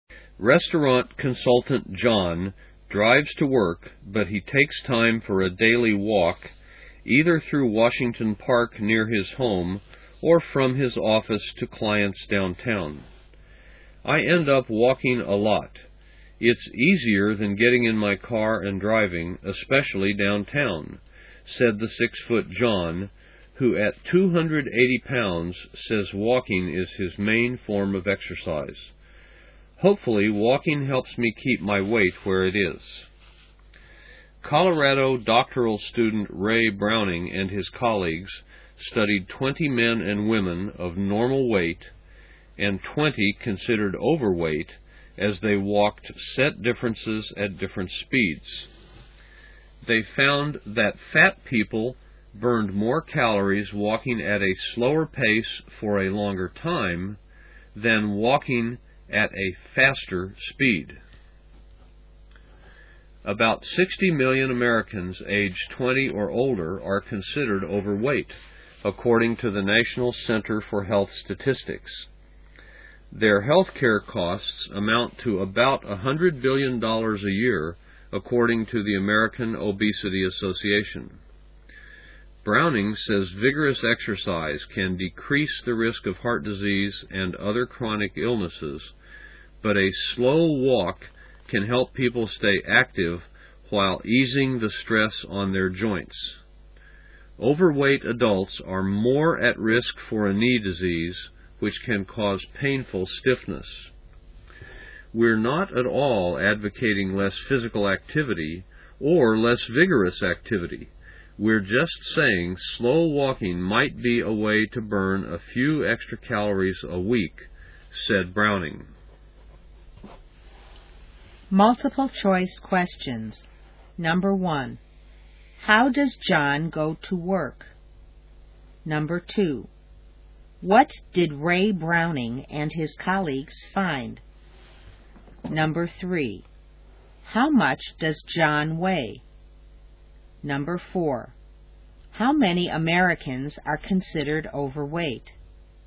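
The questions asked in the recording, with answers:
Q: How does John go to work?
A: He drives to work.

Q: What did Ray Browning and his colleagues find?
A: Fat people burned more calories walking at a slower pace for a longer time than walking faster.

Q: How much does John weigh?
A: 280 pounds

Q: How many Americans are considered overweight?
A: About 60 million (aged 20 or older)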